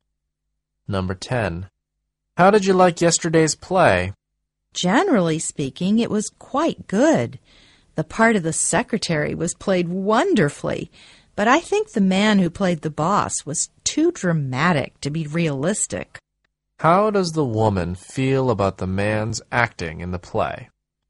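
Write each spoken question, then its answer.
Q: How does the woman feel about the man's acting in the play?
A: She thinks he was too dramatic to be realistic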